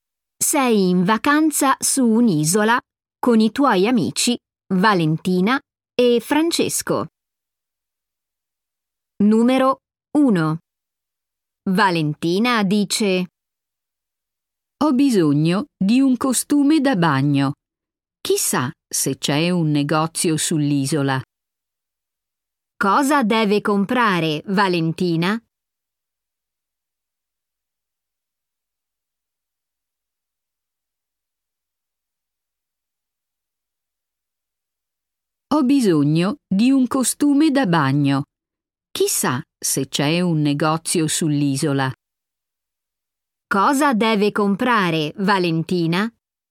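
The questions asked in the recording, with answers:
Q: Cosa deve comprare Valentina?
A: Un costume da bagno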